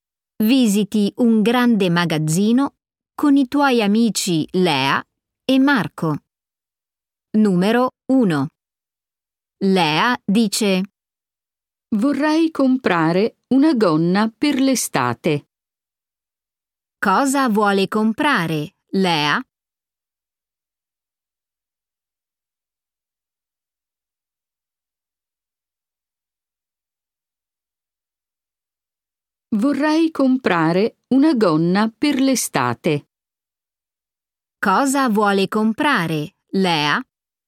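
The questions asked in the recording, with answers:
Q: Cosa vuole comprare, Lea?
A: una gonna per l'estate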